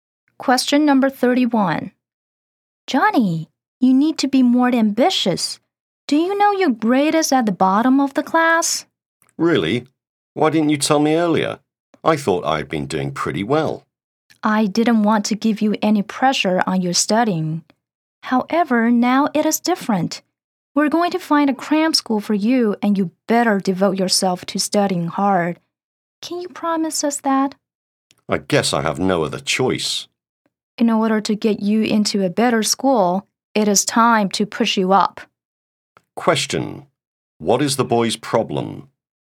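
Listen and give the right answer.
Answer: His grade is at the bottom of the class.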